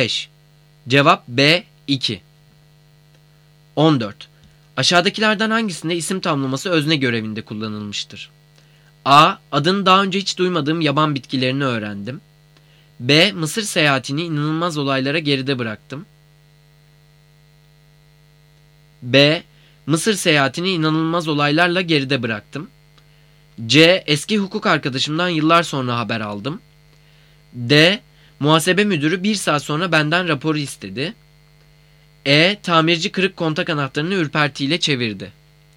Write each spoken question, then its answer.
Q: Aşağıdakilerden hangisinde isim tamlaması özne görevinde kullanılmıştır?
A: Cevap D. Muhasebe müdürü bir saat sonra benden raporu istedi.